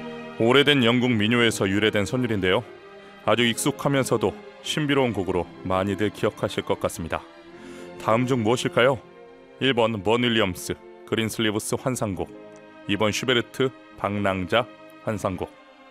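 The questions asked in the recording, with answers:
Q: 다음 중 무엇일까요? 1번 번 윌리엄스 그린슬리브스 환상곡, 2번 슈베르트 방랑자 환상곡.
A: 1: 번 윌리엄스 그린슬리브스 환상곡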